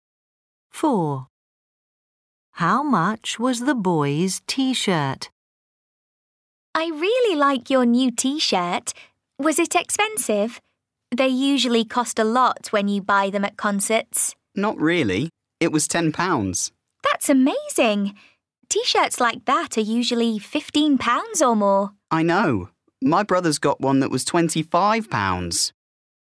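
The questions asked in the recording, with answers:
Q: How much was the boy's T-shirt?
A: £10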